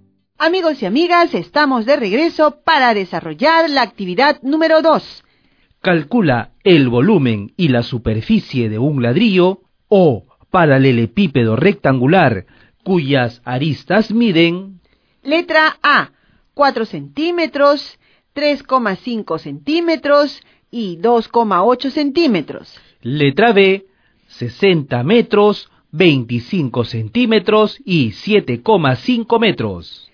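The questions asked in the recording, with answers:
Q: Calcula el volumen y la superficie de un ladrillo o paralelepípedo rectangular cuyas aristas miden... Letra A, 4 centímetros, 3,5 centímetros y 2,8 centímetros.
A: V = 39,2 cm3; S = 70 cm2

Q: Letra B, 60 metros, 25 centímetros y 7,5 metros.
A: V = 112,5 m3; S = 933,75 m2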